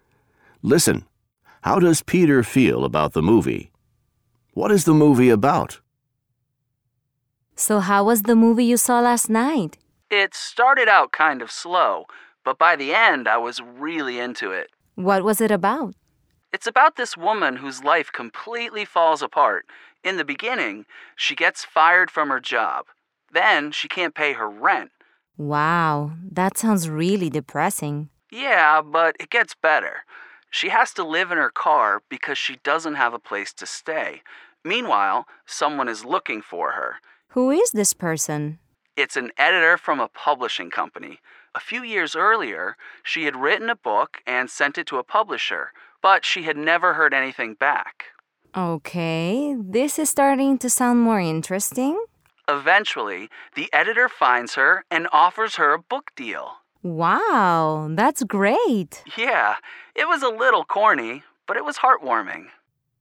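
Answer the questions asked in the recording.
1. It started slow, but by the end he was really into it; a little corny but heartwarming
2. A woman whose life falls apart, until an editor finds her and offers her a book deal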